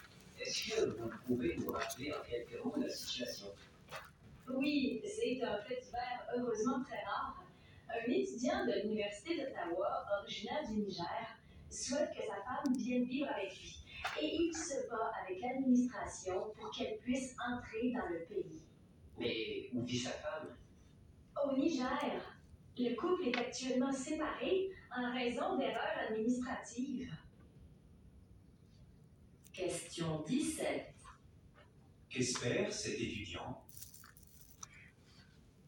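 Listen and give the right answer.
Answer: Que sa femme vienne vivre avec lui au Canada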